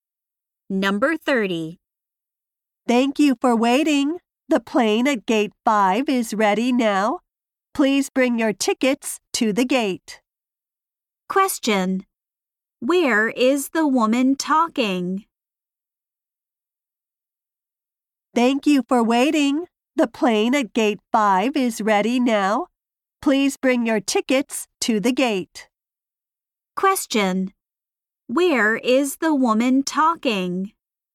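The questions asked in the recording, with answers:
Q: Where is the woman talking?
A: At an airport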